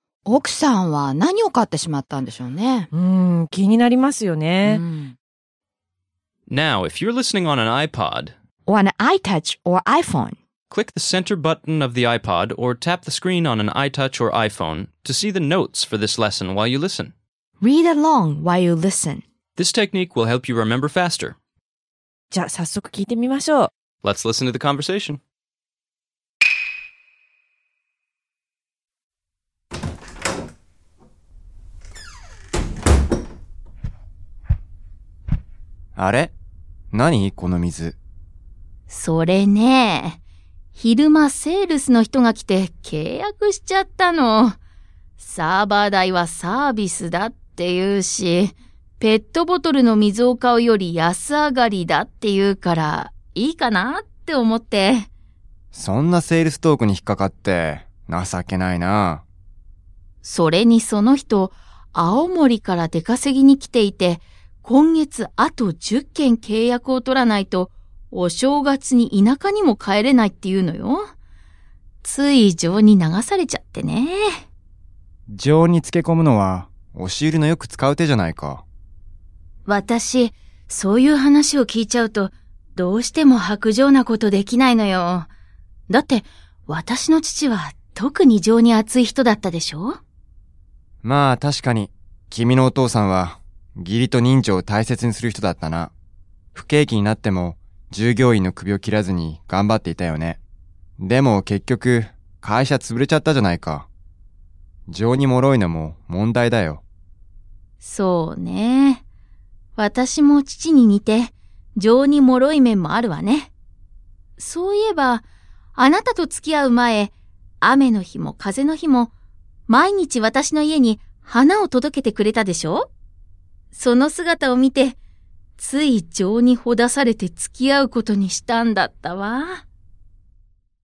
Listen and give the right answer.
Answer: 結局、買ったのはウォータークーラーみたいなもののようですね。